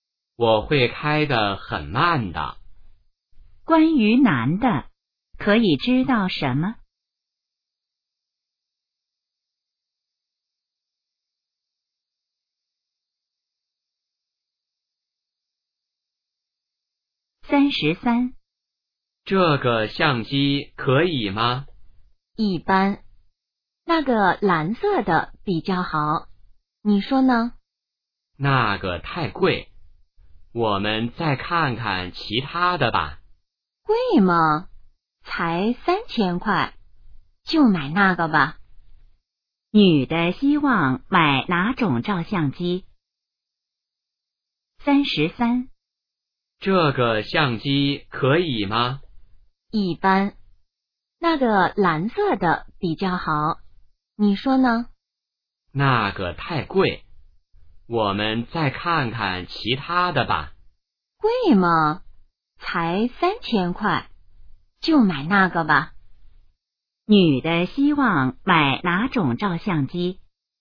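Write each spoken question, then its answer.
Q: 女的希望买哪种照相机?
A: 蓝色的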